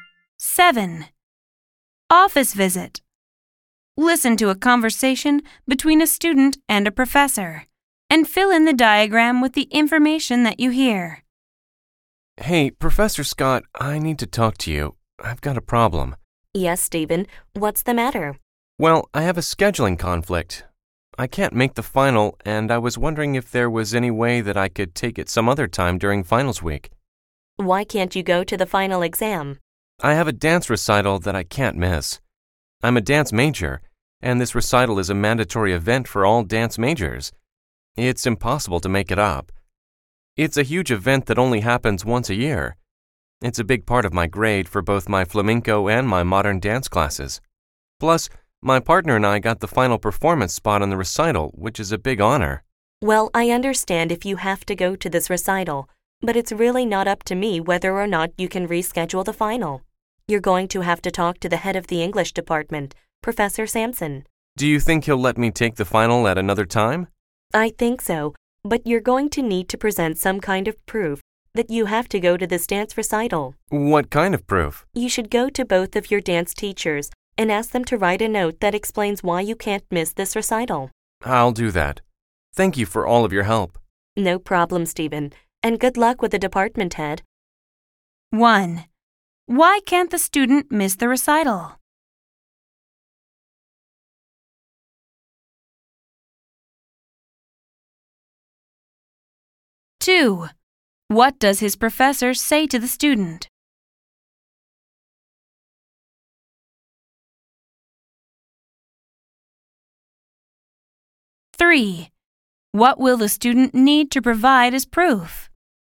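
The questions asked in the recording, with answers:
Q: Why can't the student miss the recital?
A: It is mandatory for all dance majors, can't be made up, and is a big part of his grade

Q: What will the student need to provide as proof?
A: Notes from both of his dance teachers explaining why he can't miss the recital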